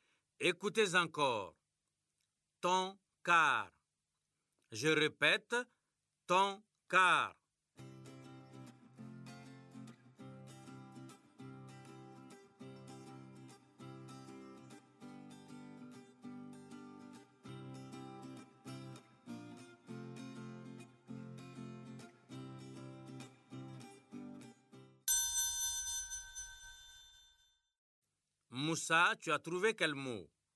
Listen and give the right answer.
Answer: Monsieur, c'est carton.